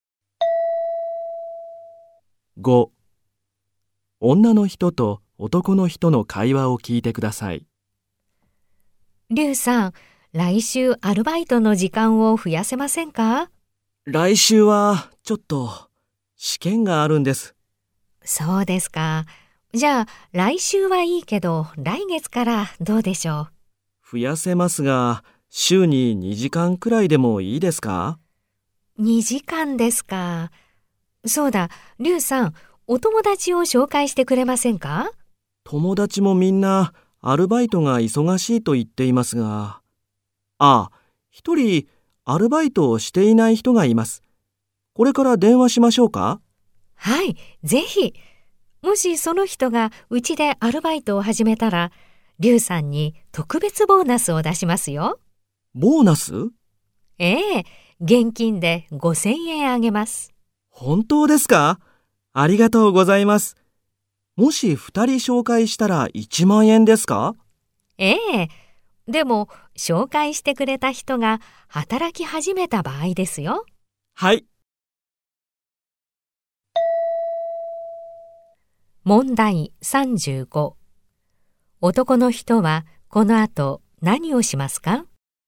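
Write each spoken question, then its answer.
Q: 男の人はこの後何をしますか?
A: 友達に電話します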